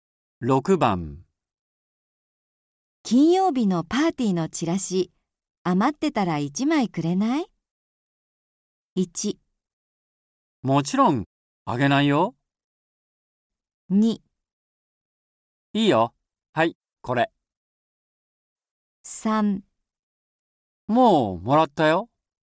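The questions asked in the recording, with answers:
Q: 金曜日のパーティーのチラシ、余ってたら1枚くれない?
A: 2: いいよ、はい、これ。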